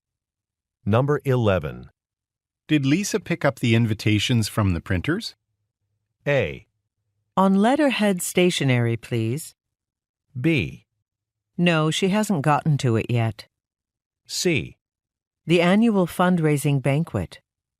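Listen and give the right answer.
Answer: B: No, she hasn't gotten to it yet.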